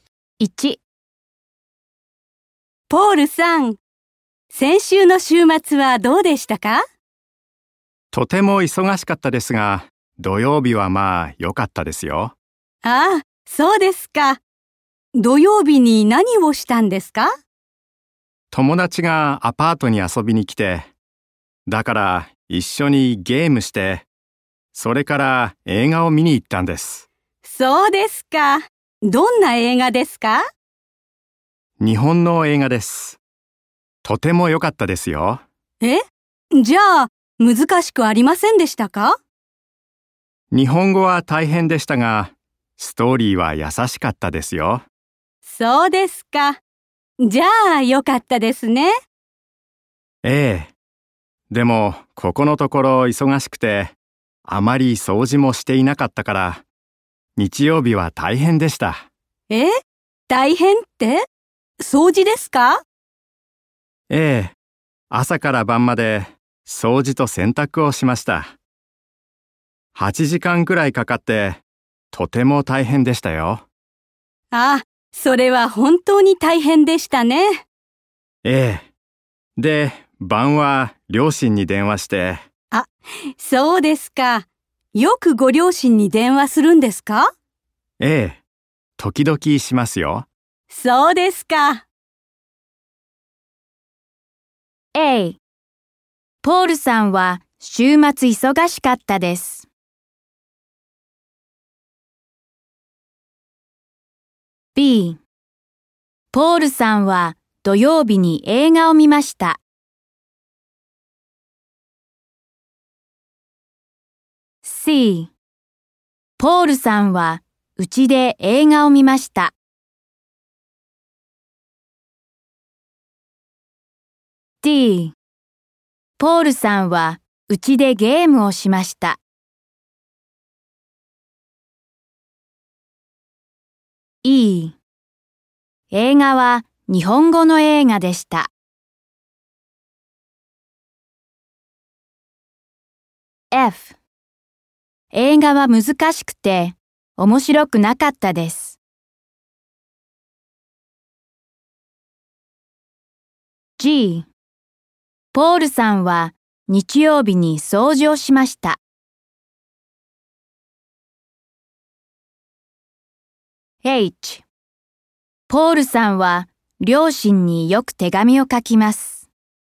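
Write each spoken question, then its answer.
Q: ポールさんは週末忙しかったです。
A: はい

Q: ポールさんは土曜日に映画を見ました。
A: はい

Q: ポールさんはうちで映画を見ました。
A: いいえ

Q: ポールさんはうちでゲームをしました。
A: はい

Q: 映画は日本語の映画でした。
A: はい

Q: 映画は難しくて面白くなかったです。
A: いいえ

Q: ポールさんは日曜日に掃除をしました。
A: はい

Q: ポールさんは両親によく手紙を書きます。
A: いいえ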